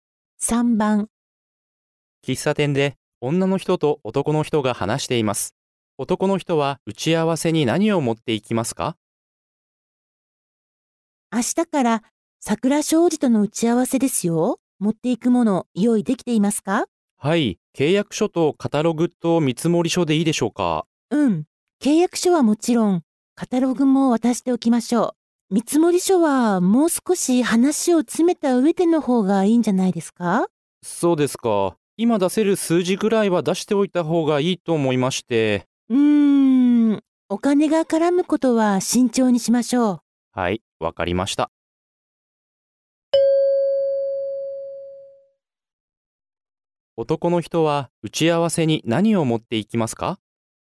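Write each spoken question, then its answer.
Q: 男の人は打ち合わせに何を持っていきますか?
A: 契約書とカタログ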